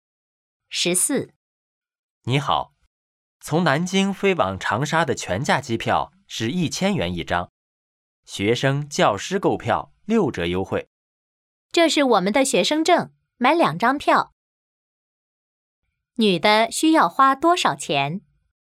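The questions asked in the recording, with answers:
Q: 女的需要花多少钱?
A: 1200元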